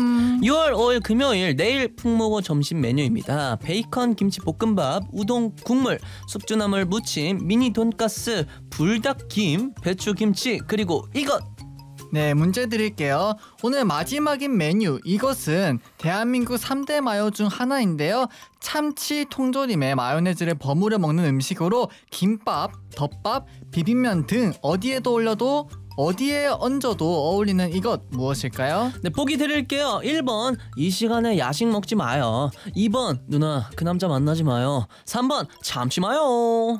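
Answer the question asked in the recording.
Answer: 3: 참치 마요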